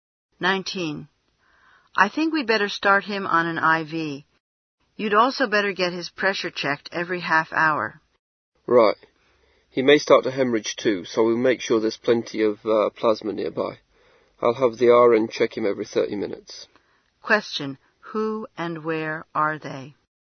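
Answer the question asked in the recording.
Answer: Doctor and nurse in a hospital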